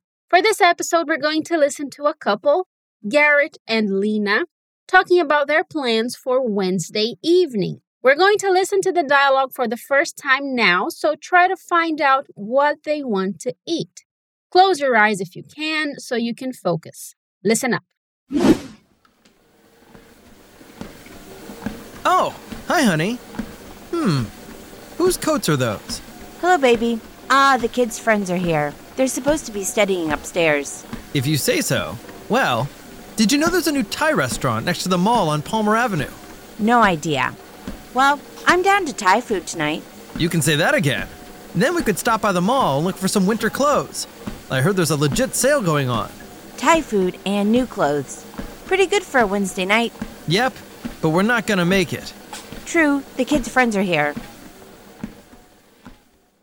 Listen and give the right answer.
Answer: So he also wants to eat Thai food.